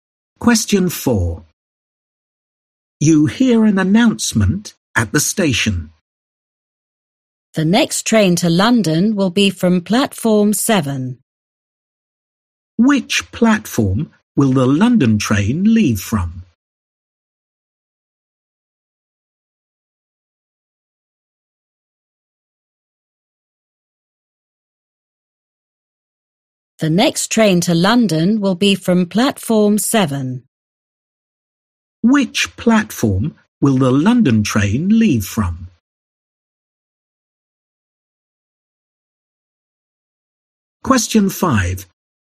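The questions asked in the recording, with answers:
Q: Which platform will the London train leave from?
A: Platform 7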